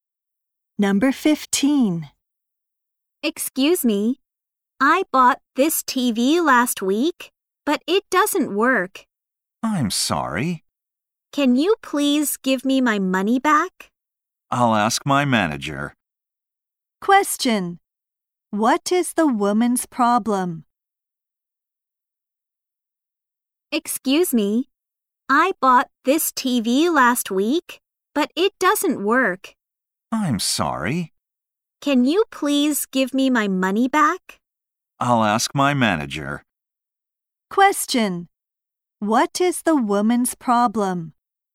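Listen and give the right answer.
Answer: Her new TV doesn't work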